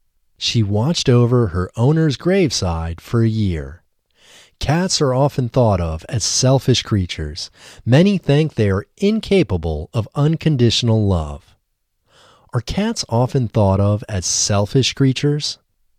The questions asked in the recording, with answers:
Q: Are cats often thought of as selfish creatures?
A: Yes, cats are often thought of as selfish creatures.